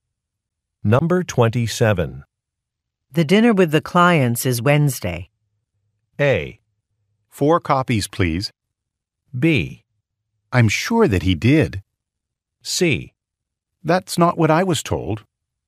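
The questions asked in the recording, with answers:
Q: The dinner with the clients is Wednesday.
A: C: That's not what I was told.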